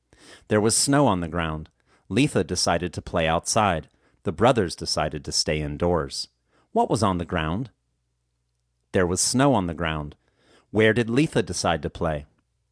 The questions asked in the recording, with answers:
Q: What was on the ground?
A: There was snow on the ground.